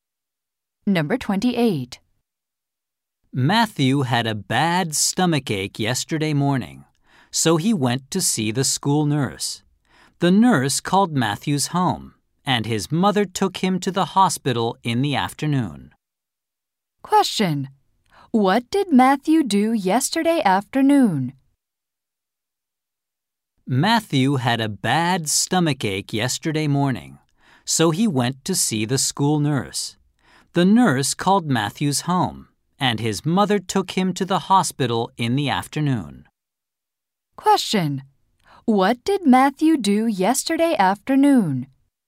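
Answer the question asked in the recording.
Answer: He went to the hospital.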